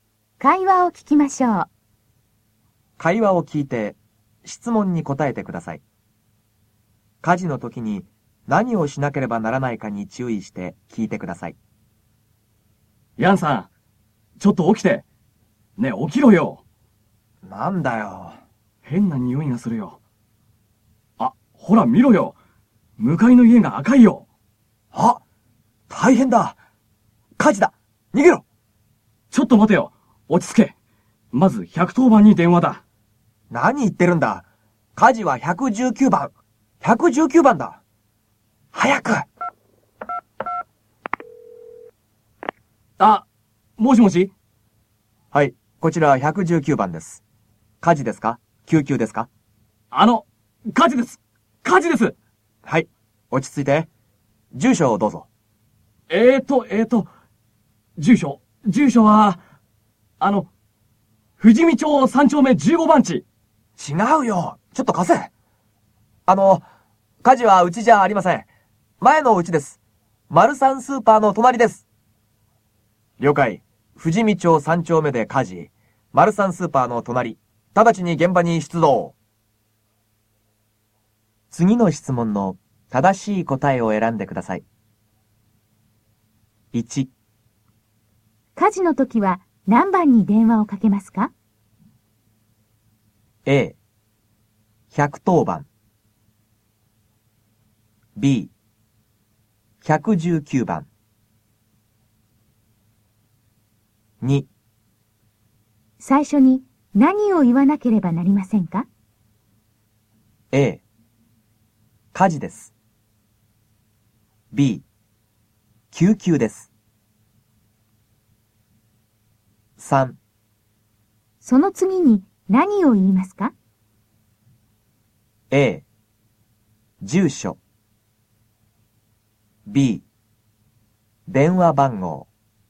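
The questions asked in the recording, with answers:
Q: 火事の時は何番に電話をかけますか?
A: B: 119番

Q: 最初に何を言わなければなりませんか?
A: A: 火事です。

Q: その次に何を言いますか?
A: A: 住所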